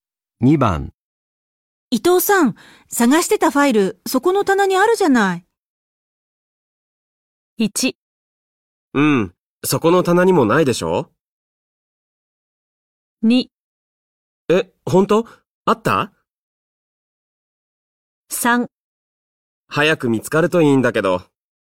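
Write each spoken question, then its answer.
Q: 伊藤さん、探してたファイル、そこの棚にあるじゃない。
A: 2: え、ほんとあった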